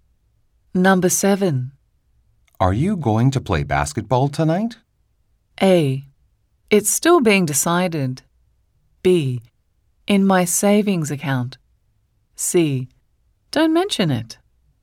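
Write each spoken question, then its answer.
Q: Are you going to play basketball tonight?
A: A: It's still being decided.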